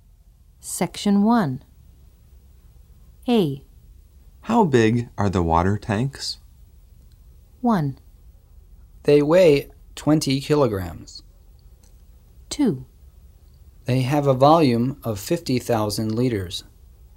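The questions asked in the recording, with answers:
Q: How big are the water tanks?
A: 2: They have a volume of 50,000 liters.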